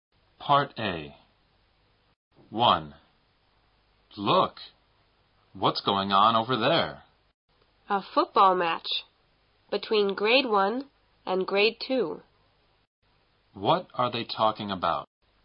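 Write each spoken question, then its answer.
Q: What are they talking about?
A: A football match between grade 1 and grade 2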